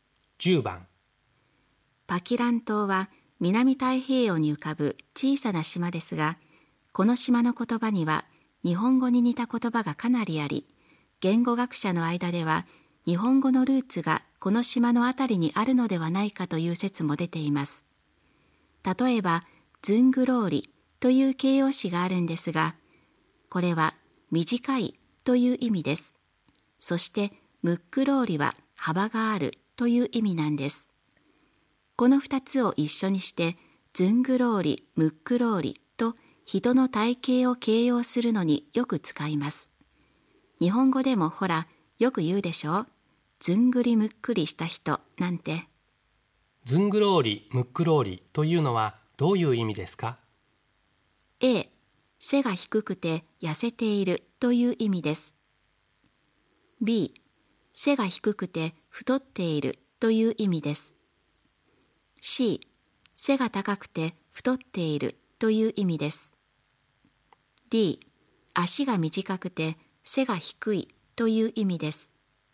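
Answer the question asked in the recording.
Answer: B: 背が低くて太っているという意味です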